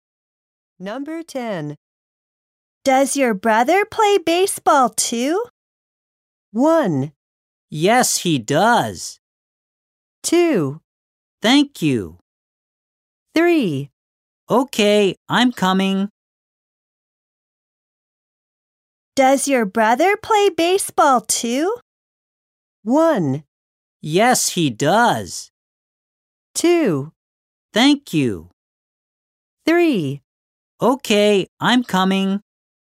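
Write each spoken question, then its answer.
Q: Does your brother play baseball too?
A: 1: Yes, he does.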